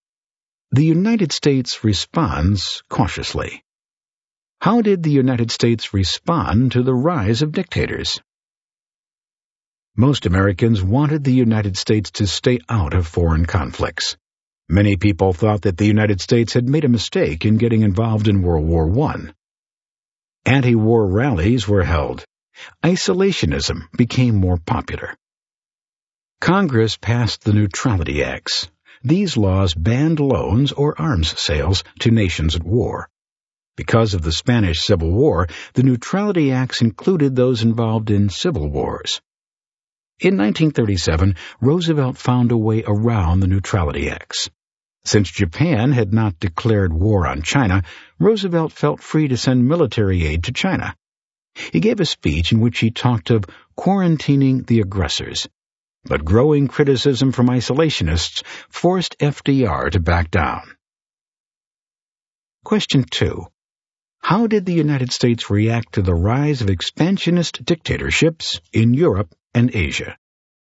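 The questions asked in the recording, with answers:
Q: How did the United States react to the rise of expansionist dictatorships in Europe and Asia?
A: Cautiously. Most Americans favored isolationism, and Congress passed the Neutrality Acts banning loans and arms sales to nations at war.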